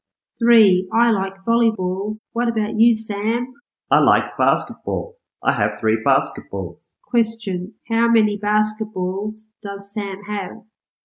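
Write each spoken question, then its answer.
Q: Question, how many basketballs does Sam have?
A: Three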